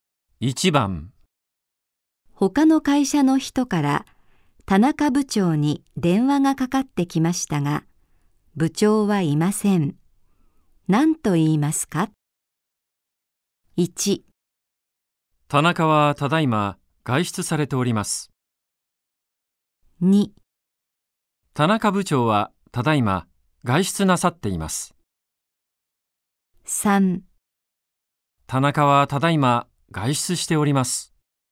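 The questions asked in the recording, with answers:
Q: 何と言いますか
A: 3: 田中はただいま外出しております。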